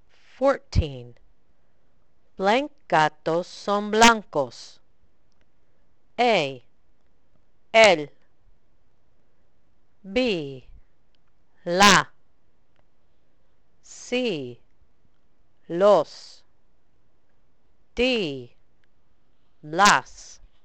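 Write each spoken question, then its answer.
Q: Blank gatos son blancos.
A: C: los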